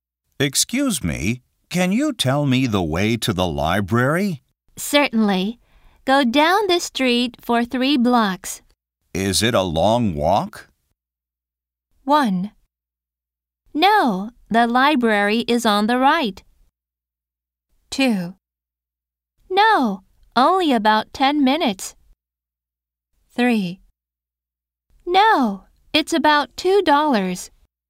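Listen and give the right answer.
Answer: 2: No, only about 10 minutes.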